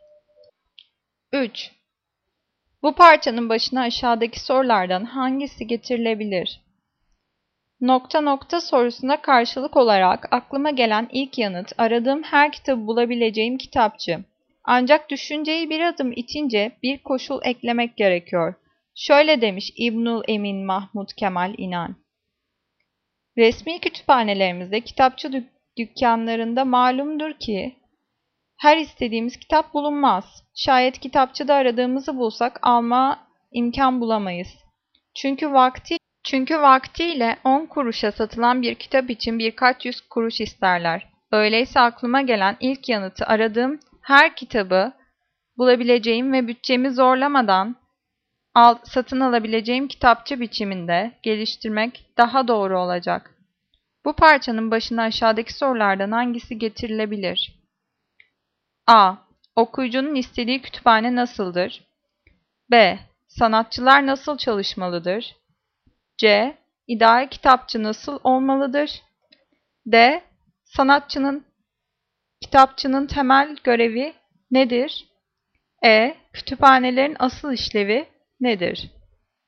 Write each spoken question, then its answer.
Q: Bu parçanın başına aşağıdaki sorulardan hangisi getirilebilir?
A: Cevap C. İdeal kitapçı nasıl olmalıdır?